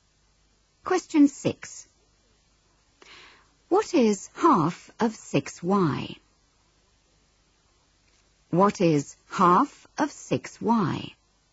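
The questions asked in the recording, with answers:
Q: What is half of 6y?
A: 3y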